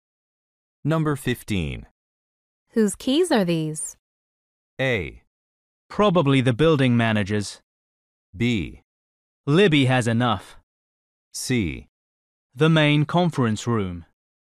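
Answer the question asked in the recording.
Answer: A: Probably the building manager's.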